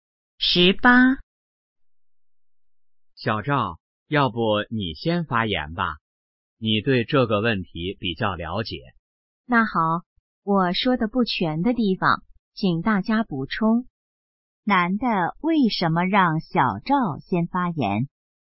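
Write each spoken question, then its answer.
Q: 男的为什么让小赵先发言?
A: 小赵对这个问题比较了解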